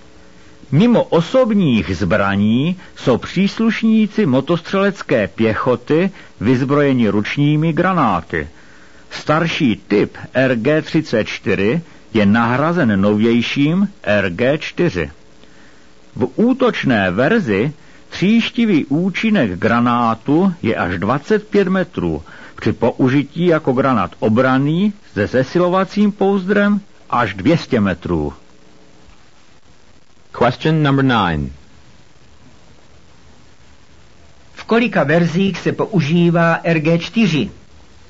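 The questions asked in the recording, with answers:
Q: V kolika verzích se používá RG-4?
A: Ve dvou: útočné a obranné (se zesilovacím pouzdrem)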